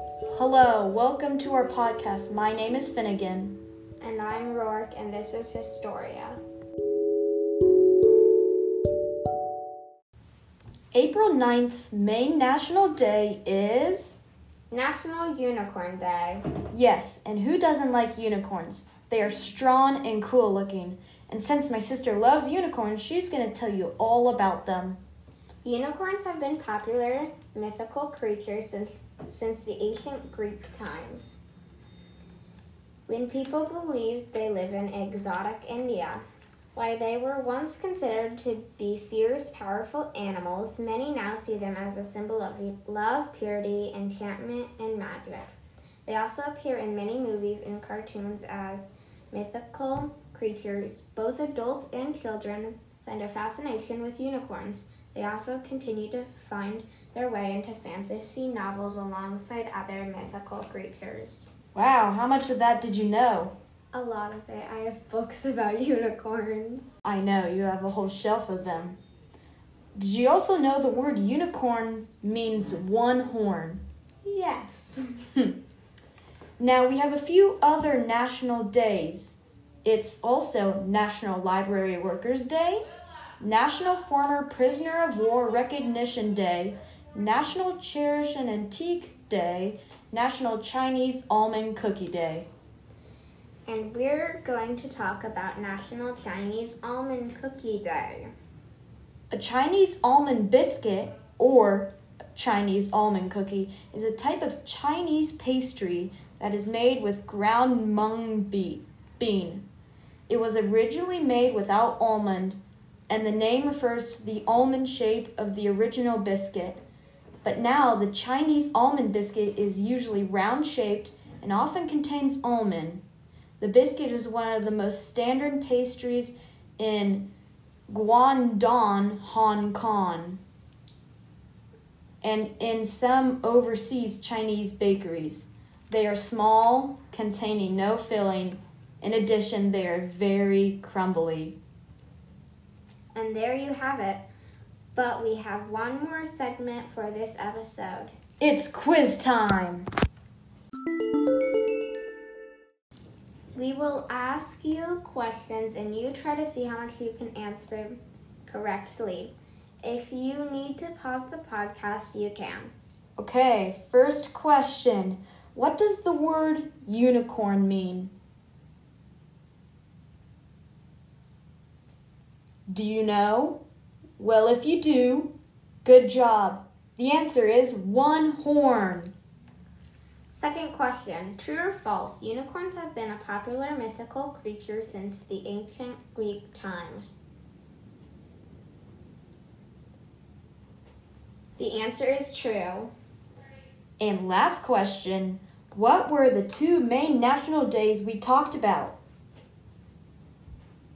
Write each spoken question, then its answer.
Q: What does the word unicorn mean?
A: The answer is one horn.

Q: what were the two main national days we talked about?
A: It was National Unicorn Day and National Chinese Almond Cookie Day.